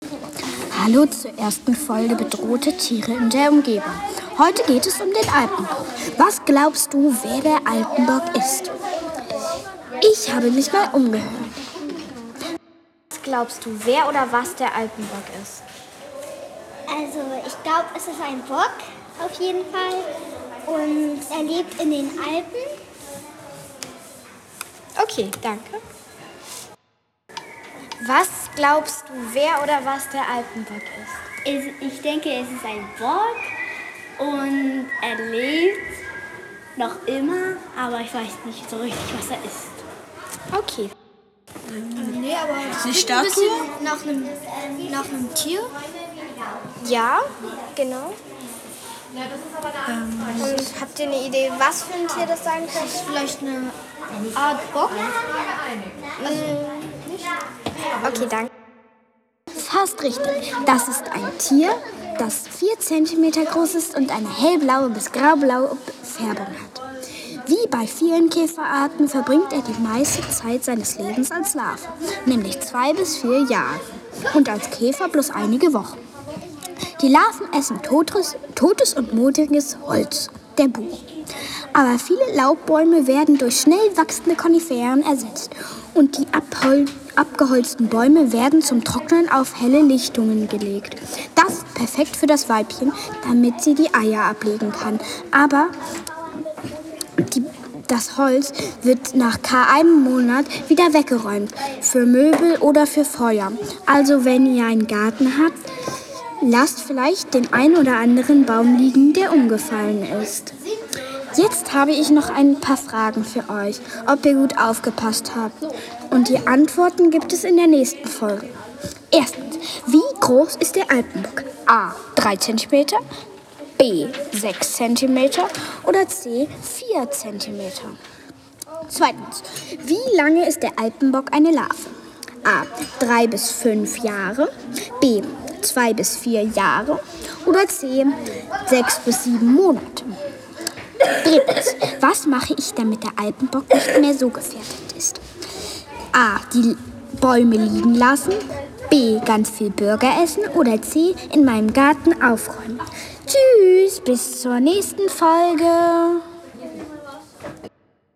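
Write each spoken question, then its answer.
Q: wie groß ist der Alpenbock?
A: C: 4 cm

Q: wie lange ist der Alpenbock eine Larve?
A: B: 2 bis 4 Jahre

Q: was mache ich, damit der Alpenbock nicht mehr so gefährdet ist?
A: A: Die Bäume liegen lassen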